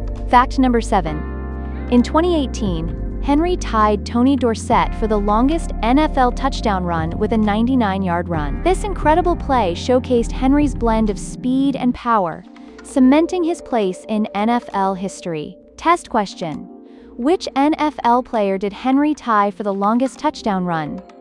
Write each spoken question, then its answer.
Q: Which NFL player did Henry tie for the longest touchdown run?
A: Tony Dorsett.